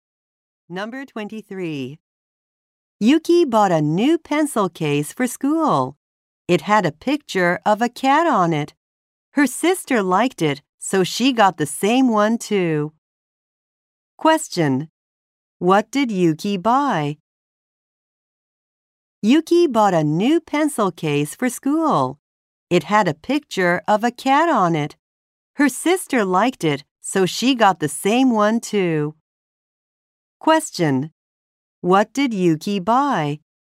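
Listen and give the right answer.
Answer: A new pencil case.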